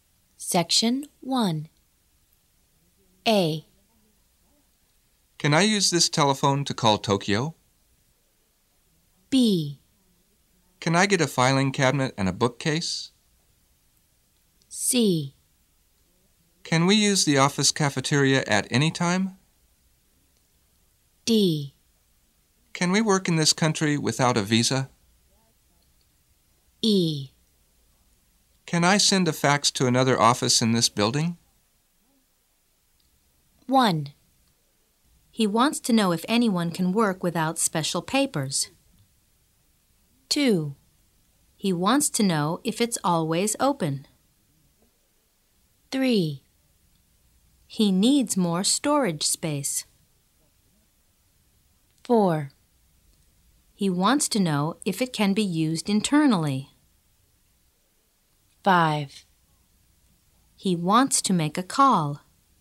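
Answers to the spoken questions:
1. D: Can we work in this country without a visa?
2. C: Can we use the office cafeteria at any time?
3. B: Can I get a filing cabinet and a bookcase?
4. E: Can I send a fax to another office in this building?
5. A: Can I use this telephone to call Tokyo?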